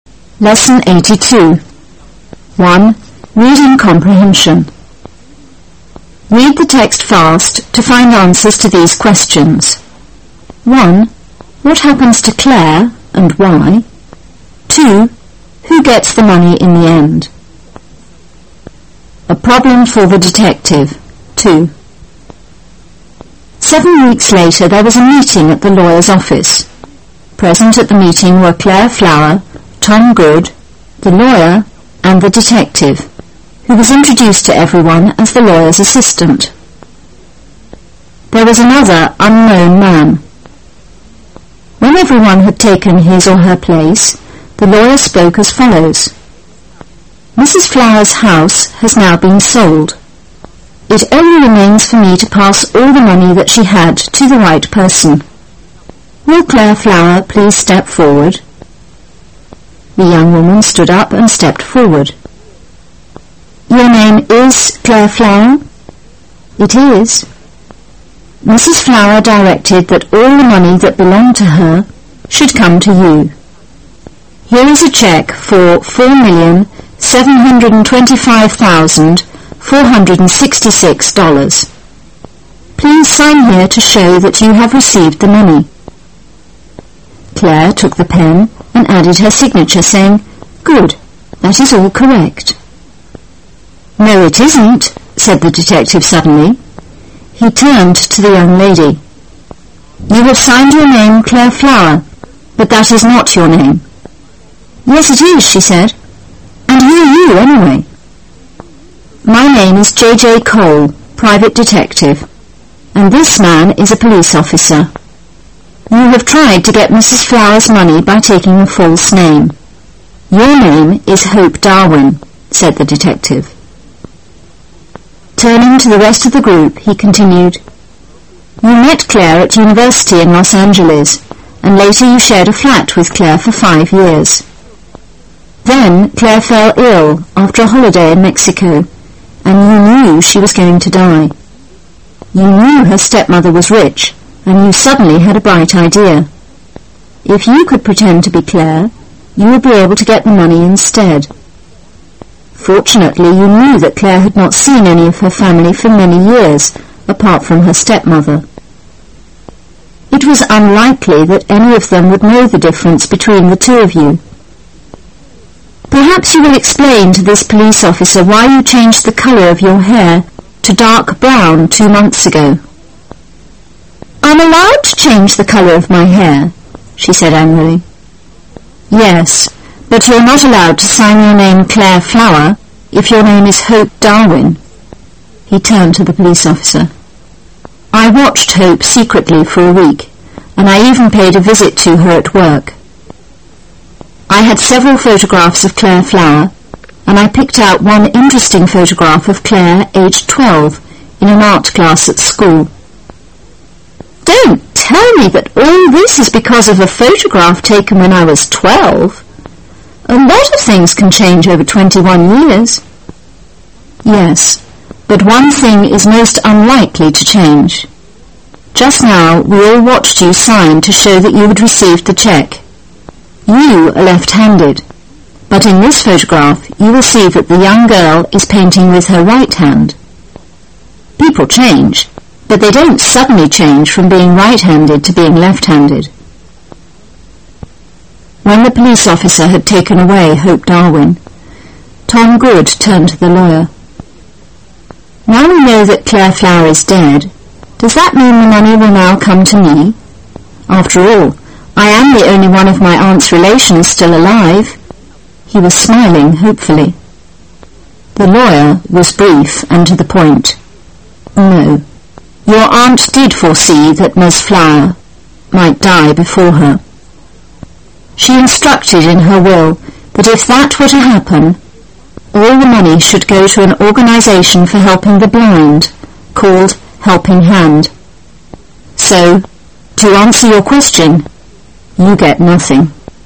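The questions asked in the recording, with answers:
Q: Who gets the money in the end?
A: Helping Hand, an organization for helping the blind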